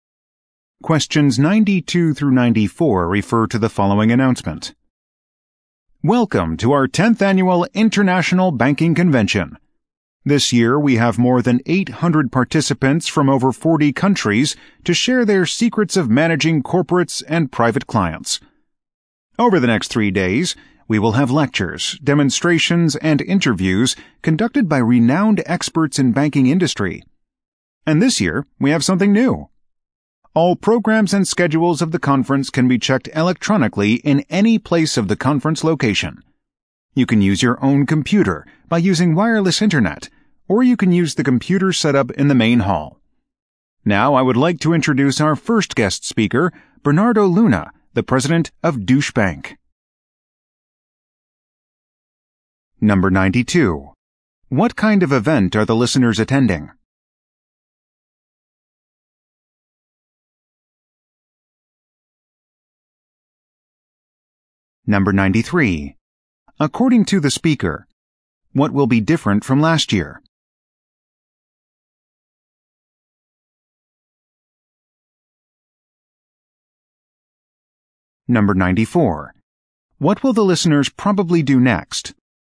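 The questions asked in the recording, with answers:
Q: What kind of event are the listeners attending?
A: An international banking convention

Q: According to the speaker, what will be different from last year?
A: Programs and schedules can be checked electronically

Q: What will the listeners probably do next?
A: Listen to the guest speaker Bernardo Luna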